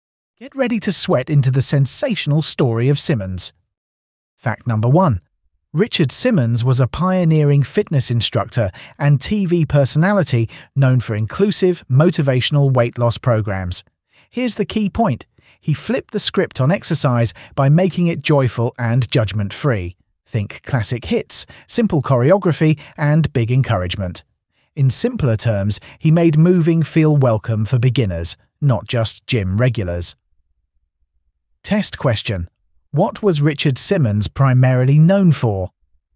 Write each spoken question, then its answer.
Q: What was Richard Simmons primarily known for?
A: Correct answer, motivational weight loss programs.